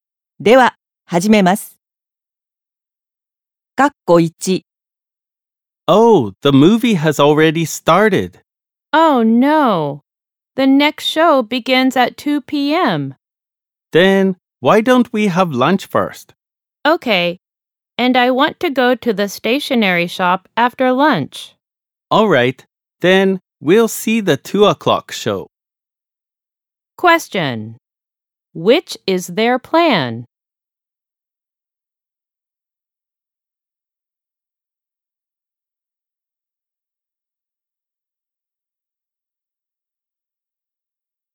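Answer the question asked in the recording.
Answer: Have lunch, go to the stationery shop, then see the 2 p.m. movie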